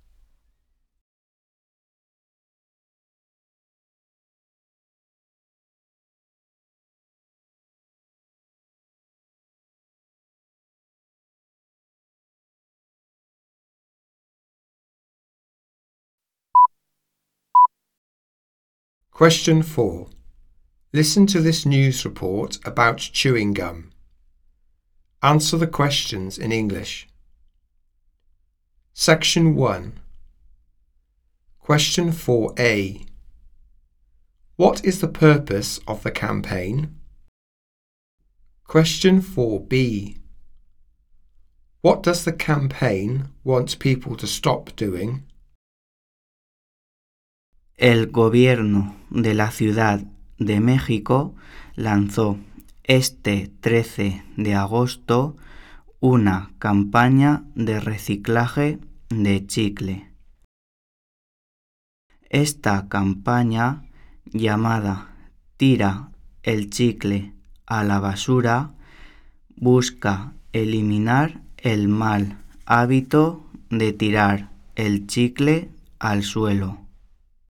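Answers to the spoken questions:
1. To recycle chewing gum
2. Throwing chewing gum on the ground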